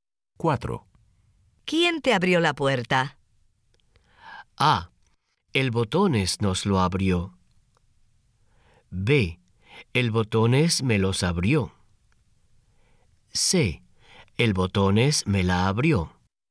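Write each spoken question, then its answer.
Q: ¿Quién te abrió la puerta?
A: C: El Botones me la abrió.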